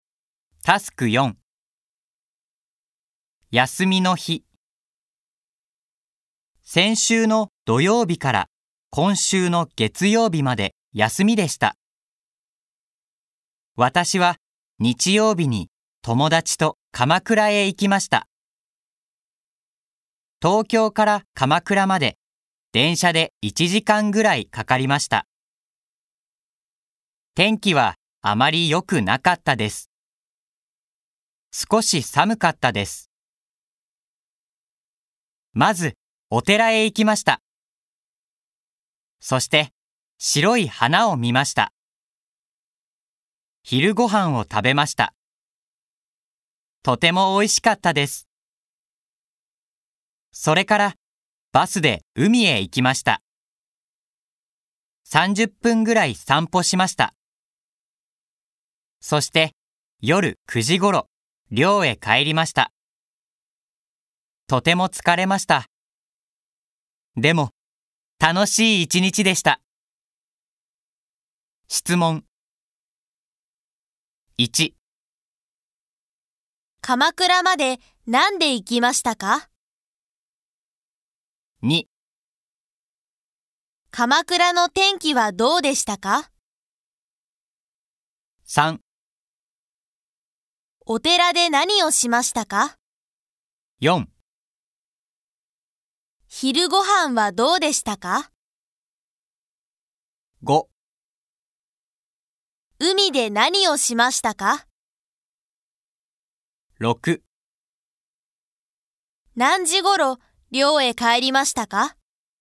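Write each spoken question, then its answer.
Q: 鎌倉までなんで行きましたか?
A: 電車で行きました

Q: 鎌倉の天気はどうでしたか?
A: あまり良くなかったです。少し寒かったです

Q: お寺で何をしましたか?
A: 白い花を見ました

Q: 昼ご飯はどうでしたか?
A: とても美味しかったです

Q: 海で何をしましたか?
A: 30分ぐらい散歩しました

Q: 何時ごろ寮へ帰りましたか?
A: 夜9時ごろ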